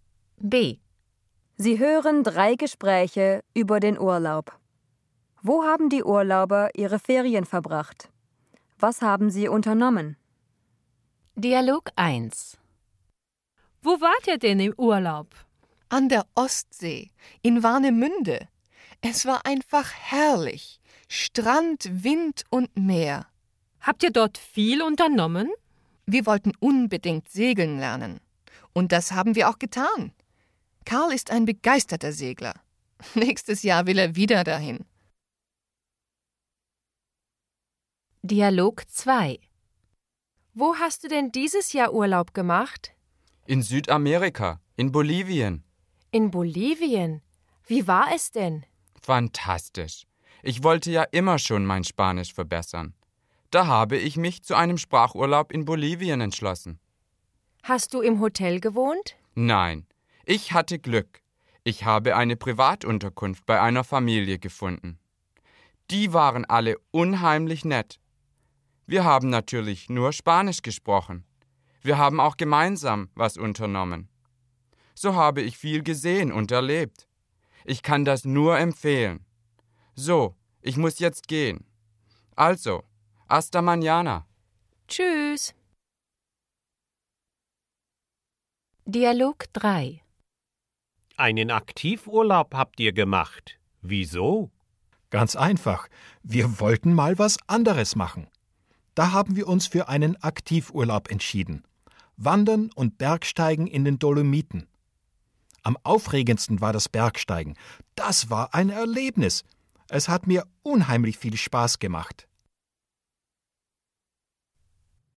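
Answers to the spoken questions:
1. An der Ostsee, in Warnemünde
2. Sie haben segeln gelernt
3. In Südamerika, in Bolivien (bei einer Familie)
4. Einen Sprachurlaub, um Spanisch zu verbessern
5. In den Dolomiten
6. Wandern und Bergsteigen (Aktivurlaub)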